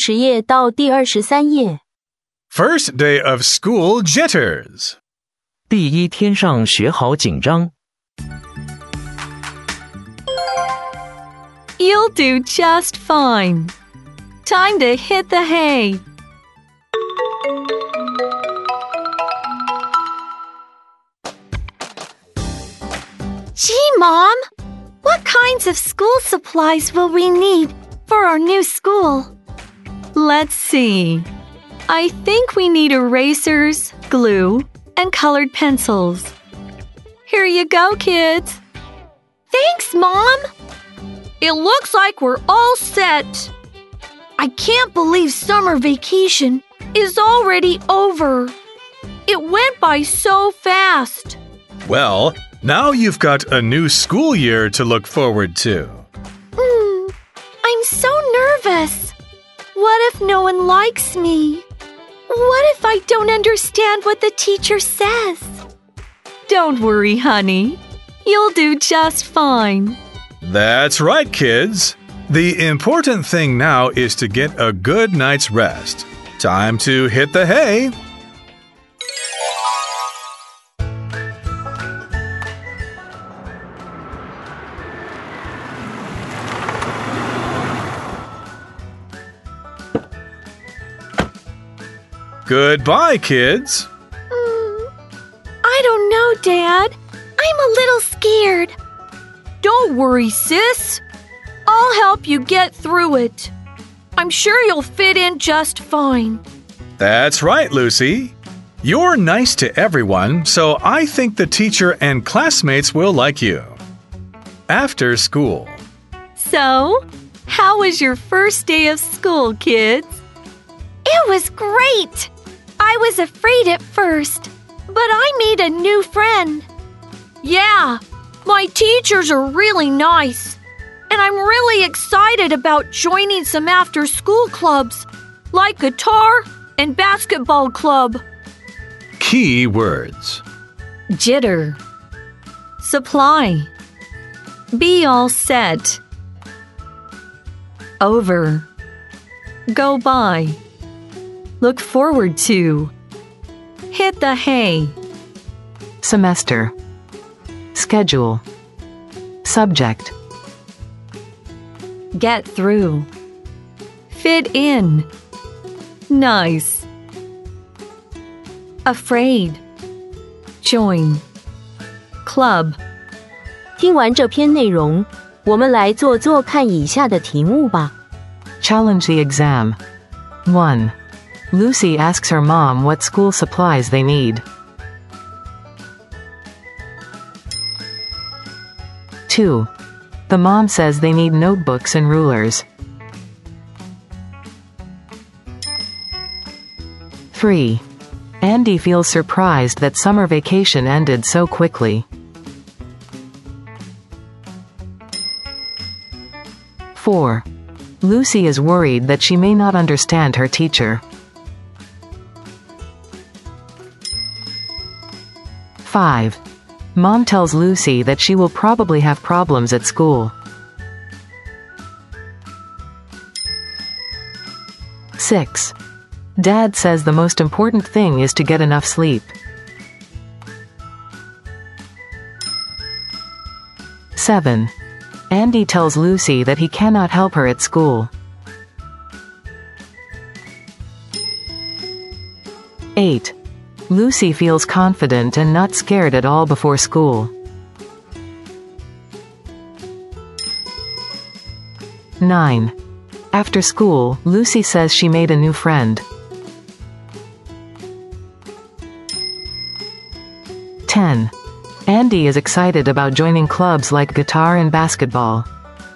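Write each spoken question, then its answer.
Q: The mom says they need notebooks and rulers.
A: False

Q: Mom tells Lucy that she will probably have problems at school.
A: False

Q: Andy tells Lucy that he cannot help her at school.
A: False

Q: Lucy feels confident and not scared at all before school.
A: False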